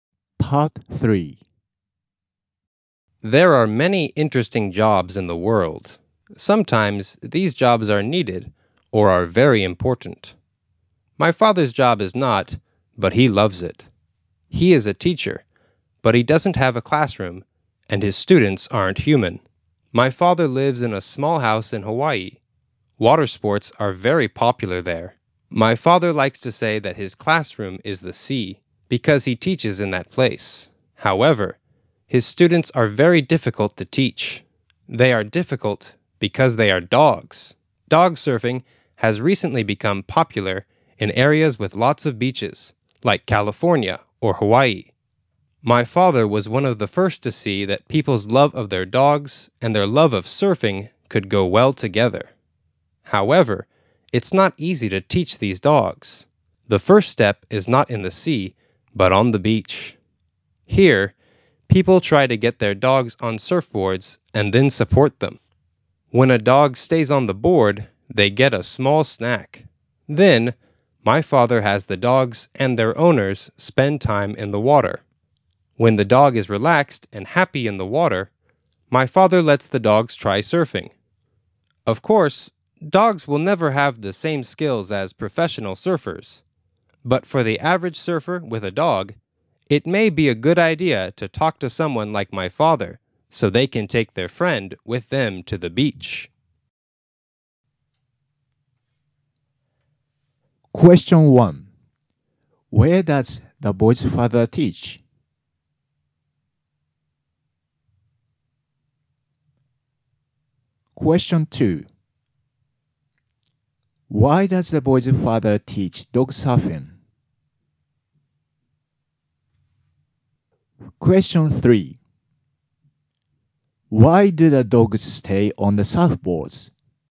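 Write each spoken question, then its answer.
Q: Where does the boy's father teach?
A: In the sea (in Hawaii)

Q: Why do the dogs stay on the surfboards?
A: They get a small snack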